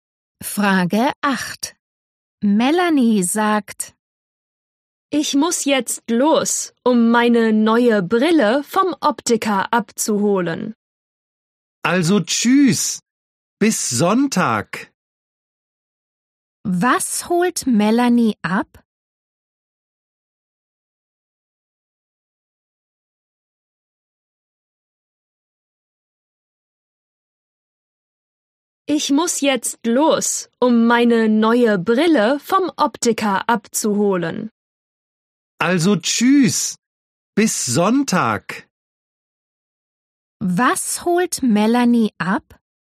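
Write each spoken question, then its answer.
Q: Was holt Melanie ab?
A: Ihre neue Brille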